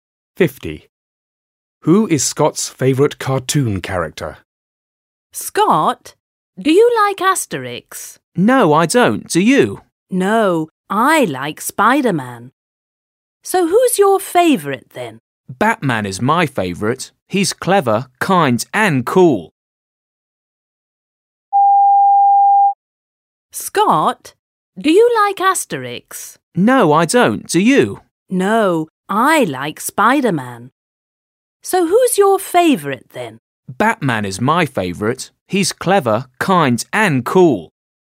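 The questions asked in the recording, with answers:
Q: Who is Scott's favourite cartoon character?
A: Batman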